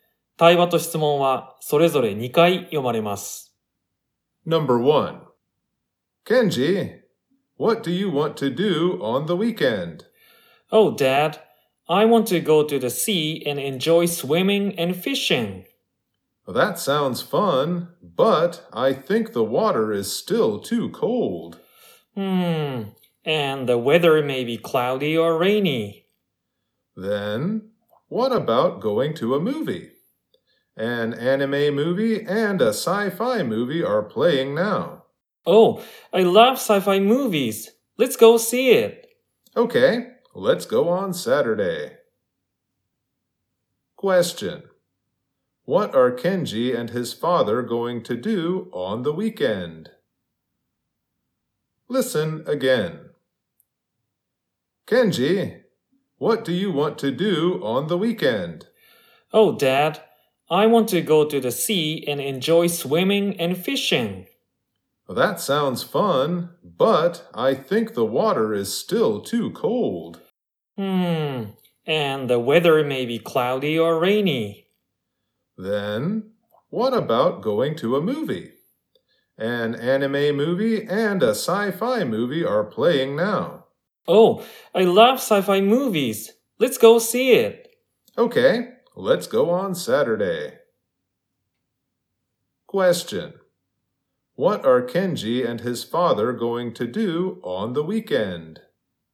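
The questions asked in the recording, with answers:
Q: What are Kenji and his father going to do on the weekend?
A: Go to see a sci-fi movie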